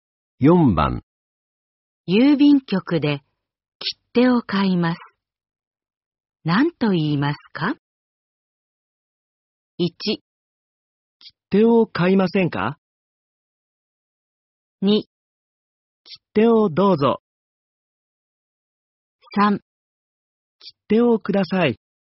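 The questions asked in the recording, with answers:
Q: 郵便局で切手を買います。何と言いますか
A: 3: 切手をください。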